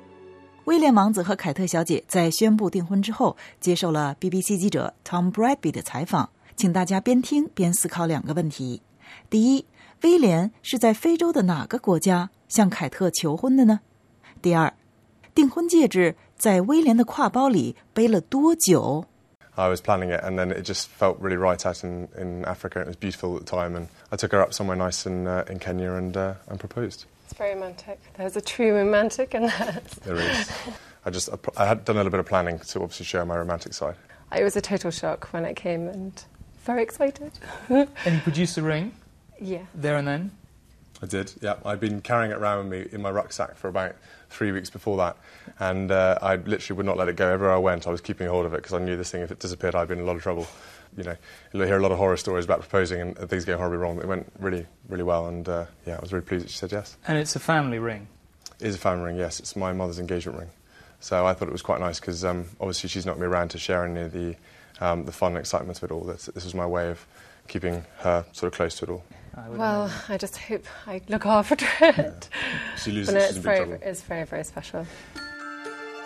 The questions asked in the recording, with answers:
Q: 第一威廉是在非洲的哪个国家向凯特求婚的呢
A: 第一,威廉在非洲的哪个国家向凯特求婚的? It was Kenya.

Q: 第二,订婚戒指在威廉的挎包里背了多久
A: 第二,订婚戒指在威廉的挎包里背了多久呢? The answer, about 3 weeks.